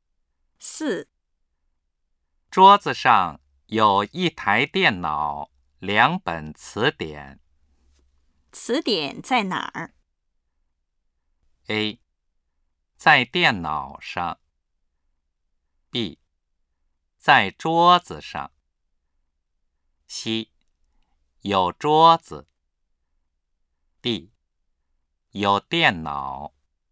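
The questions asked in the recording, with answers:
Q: 词典在哪儿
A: B: 在桌子上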